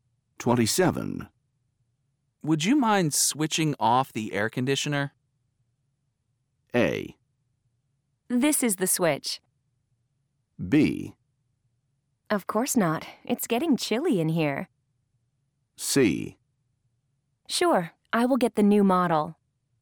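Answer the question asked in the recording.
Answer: B: Of course not. It's getting chilly in here.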